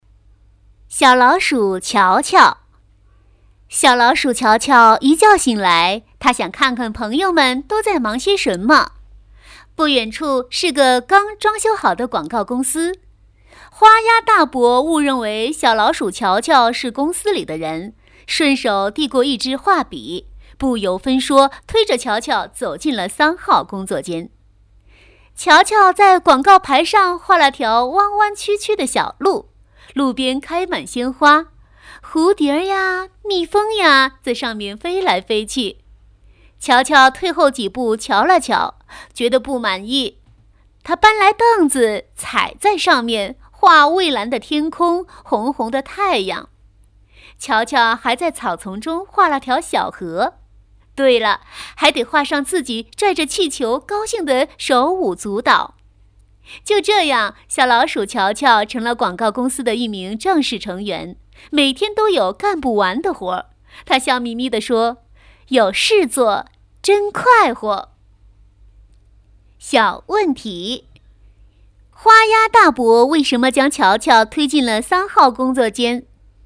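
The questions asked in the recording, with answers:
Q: 花鸭大伯为什么将乔乔推进了三号工作间?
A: 因为花鸭大伯误认为乔乔是公司里的人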